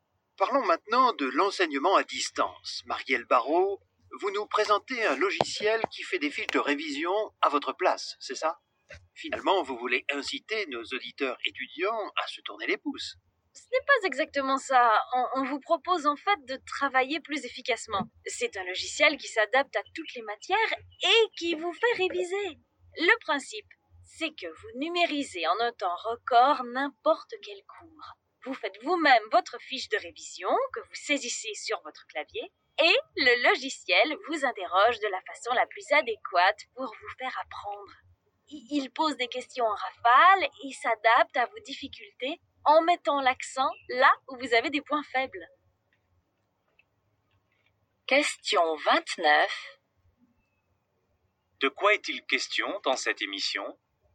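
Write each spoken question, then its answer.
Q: De quoi est-il question dans cette émission ?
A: D'un logiciel qui aide les étudiants à réviser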